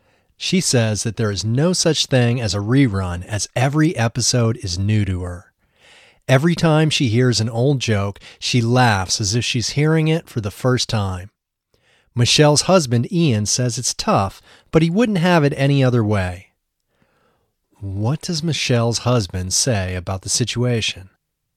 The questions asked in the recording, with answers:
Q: What does Michelle's husband say about the situation?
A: He says it's tough, but he wouldn't have it any other way.